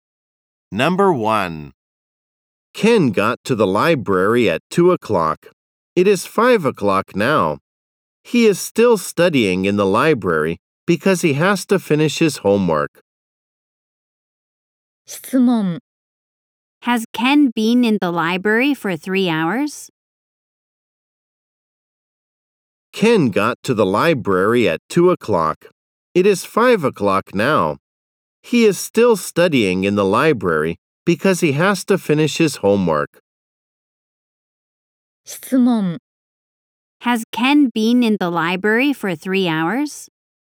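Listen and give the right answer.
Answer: Yes, he has.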